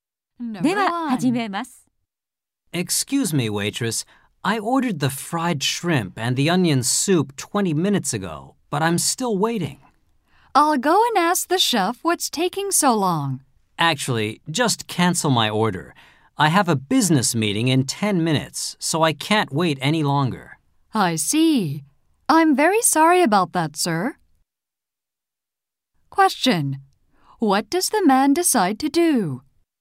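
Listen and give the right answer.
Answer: Cancel his order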